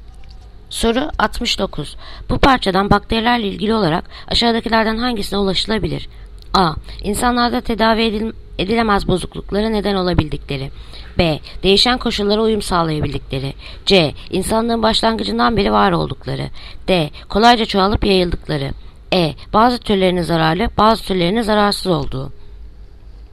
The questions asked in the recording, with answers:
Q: Bu parçadan bakterilerle ilgili olarak aşağıdakilerden hangisine ulaşılabilir?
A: Yanıt Bursa. Değişen koşullara uyum sağlayabildikleri.